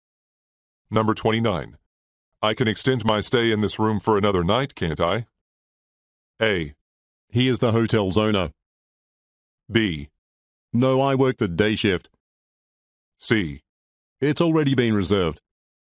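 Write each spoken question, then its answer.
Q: I can extend my stay in this room for another night, can't I?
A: C: It's already been reserved.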